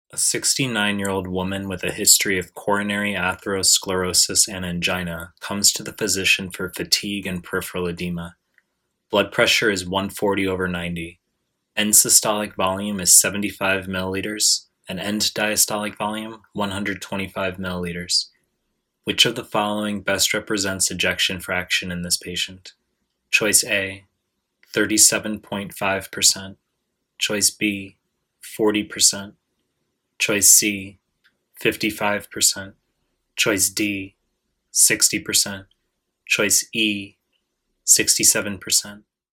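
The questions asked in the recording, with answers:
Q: Which of the following best represents ejection fraction in this patient?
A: B: 40%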